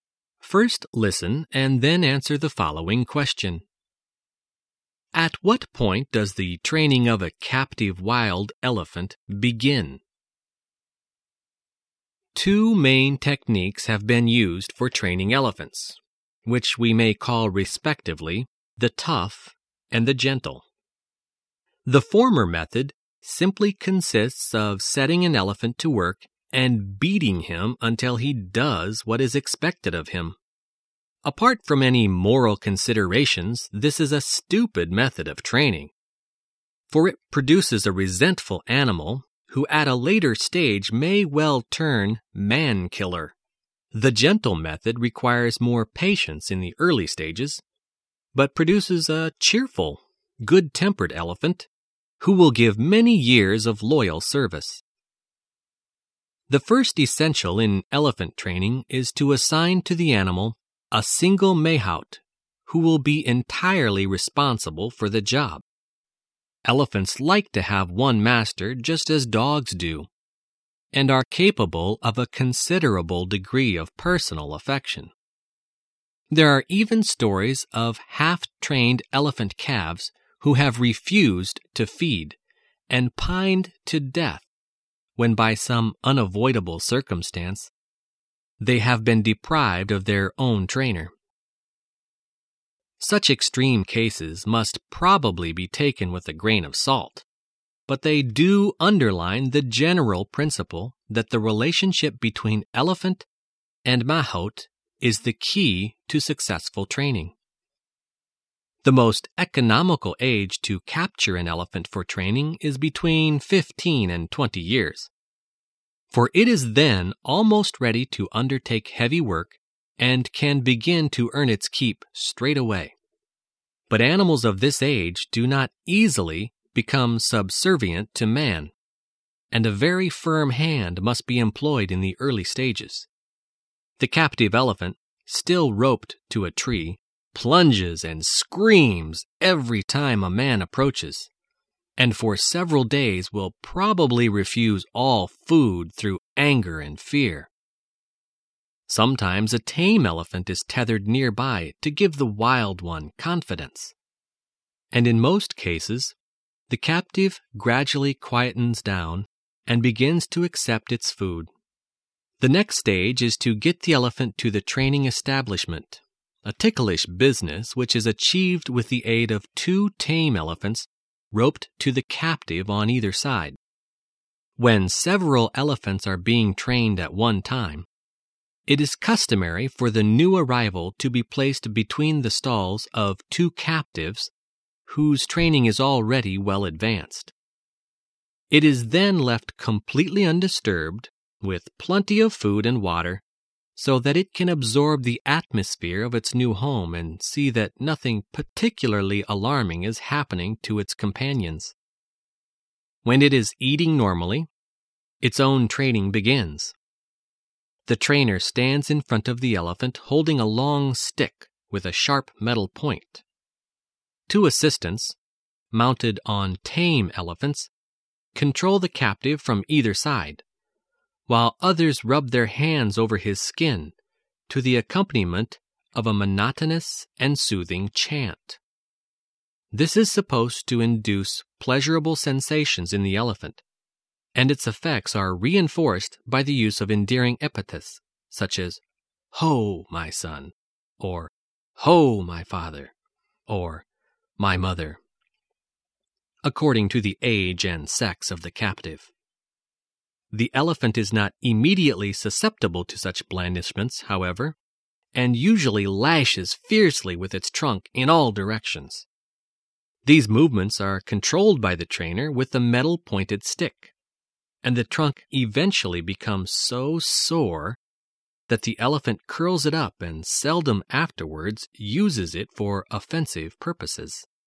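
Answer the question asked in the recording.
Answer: When it is eating normally (in its new home at the training establishment)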